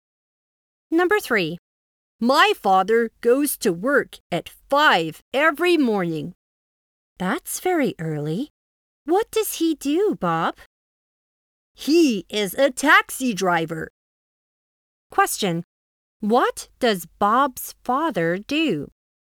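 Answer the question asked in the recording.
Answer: He is a taxi driver.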